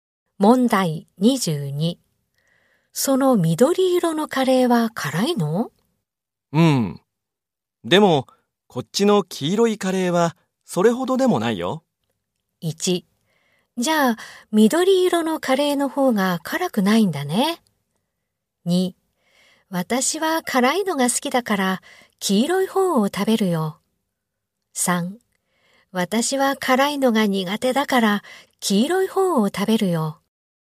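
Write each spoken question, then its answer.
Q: その緑色のカレーは辛いの?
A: 3: 私は辛いのが苦手だから、黄色い方を食べるよ。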